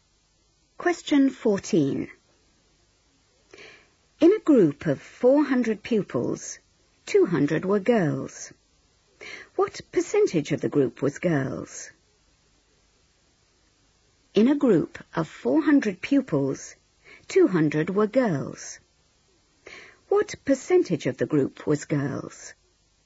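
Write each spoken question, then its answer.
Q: What percentage of the group was girls?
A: 50%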